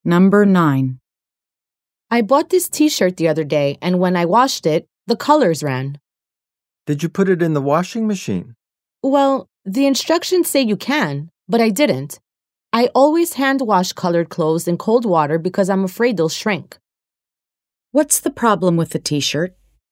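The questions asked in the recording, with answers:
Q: What's the problem with the t-shirt?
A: The colors ran when it was washed.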